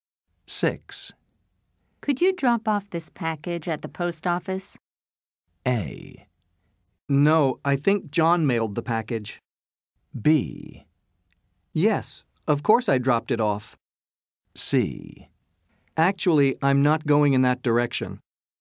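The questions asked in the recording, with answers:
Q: Could you drop off this package at the post office?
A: C: Actually, I'm not going in that direction.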